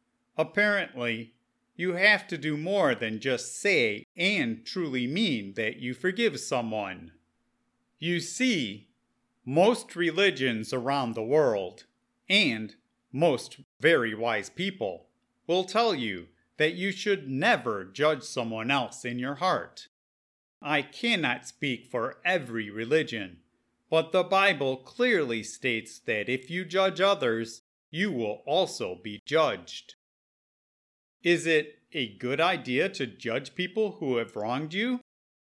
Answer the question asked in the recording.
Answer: No. It is very unwise to judge other people, no matter what they have done to you.